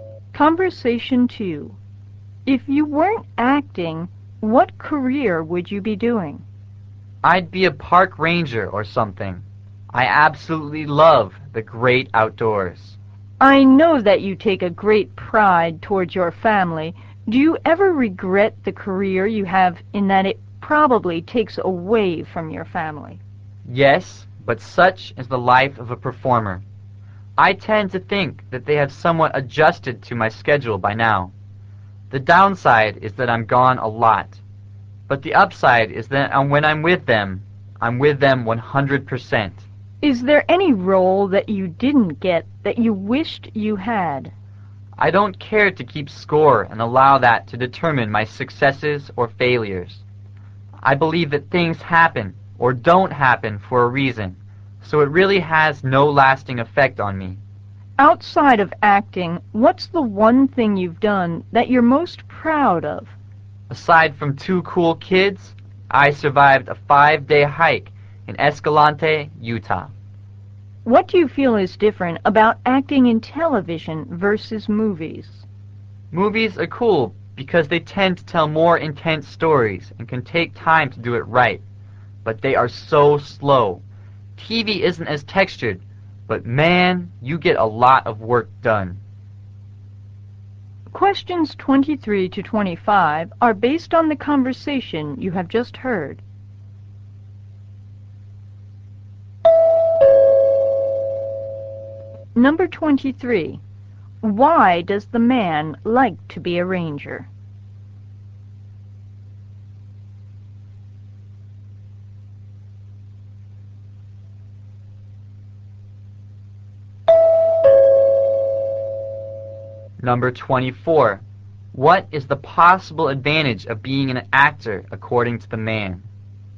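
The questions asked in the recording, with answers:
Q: Why does the man like to be a ranger?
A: He loves the great outdoors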